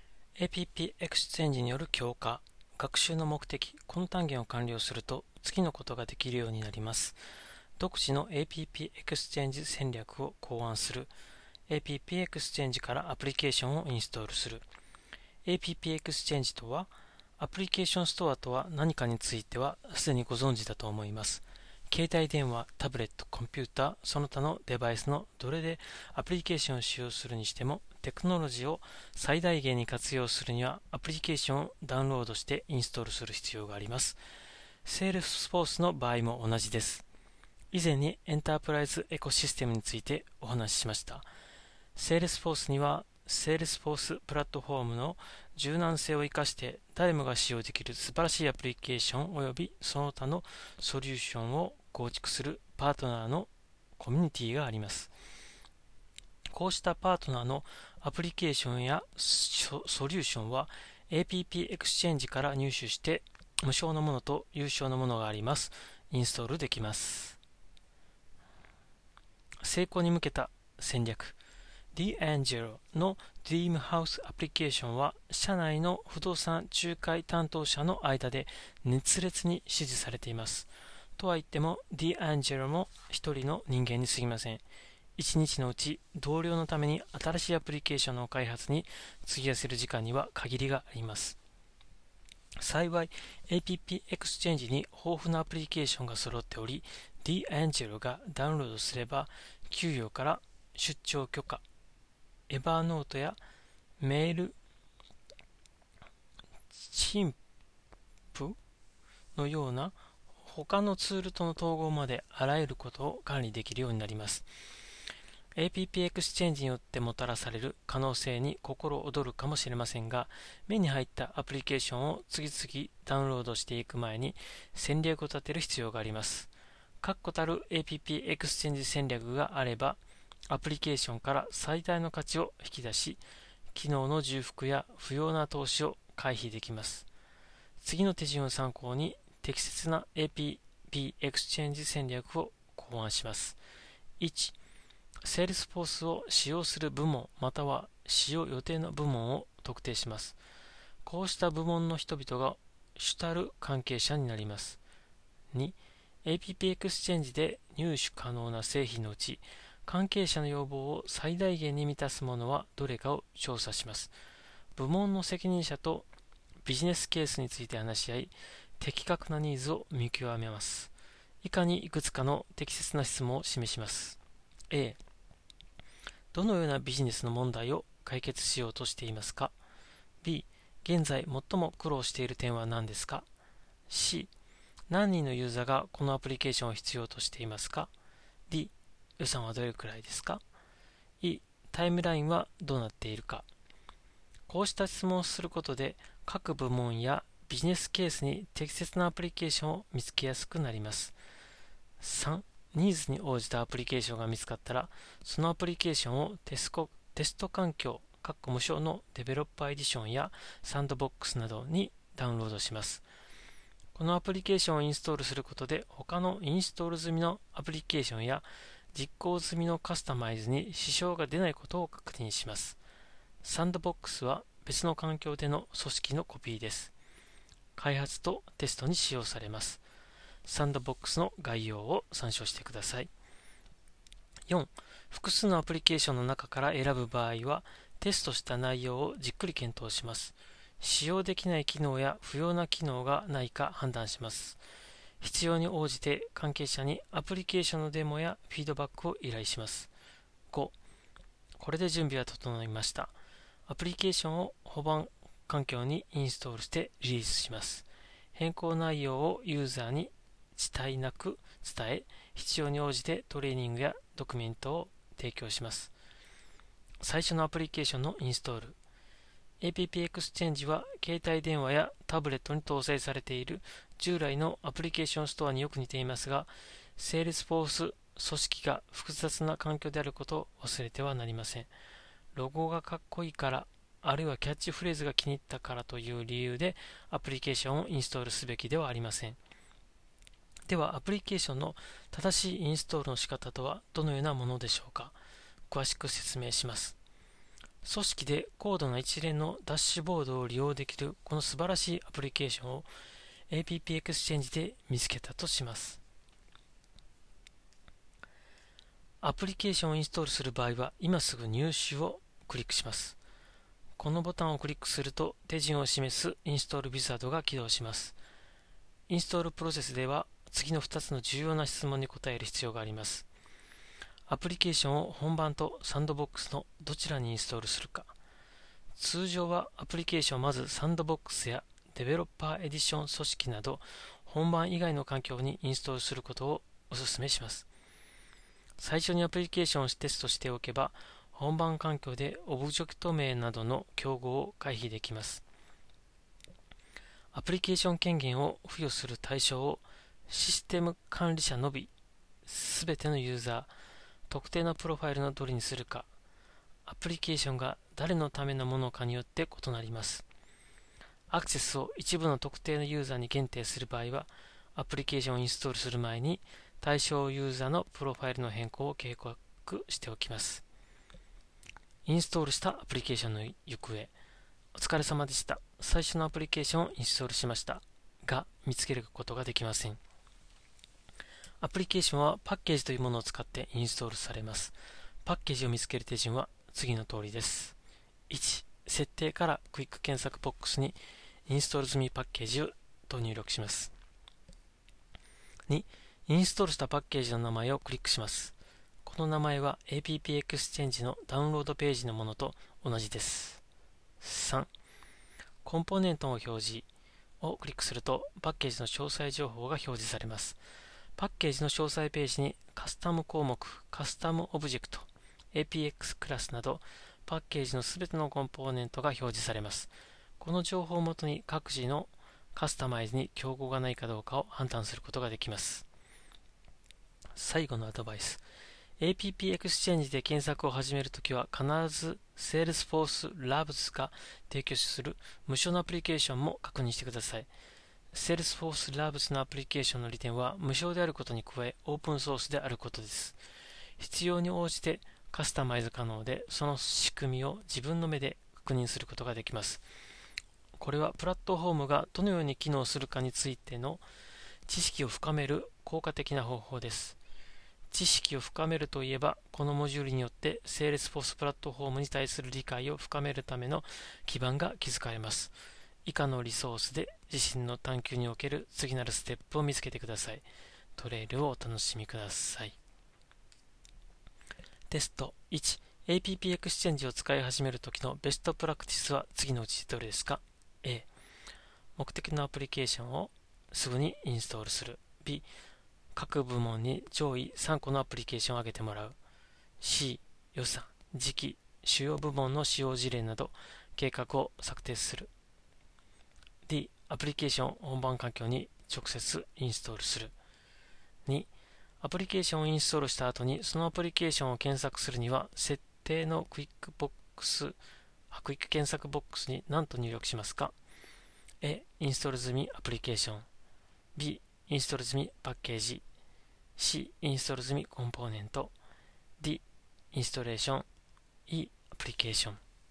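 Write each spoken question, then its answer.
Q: APP エクスチェンジを使い始める時のベストプラクティスは次のうちどれですか ?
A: C: 予算時期主要部門の使用事例など計画を策定する

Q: アプリケーションをインストールした後に、そのアプリケーションを検索するには、設定のクイックボックス、クイック検索ボックスに何と入力しますか ?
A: B: インストール済みパッケージ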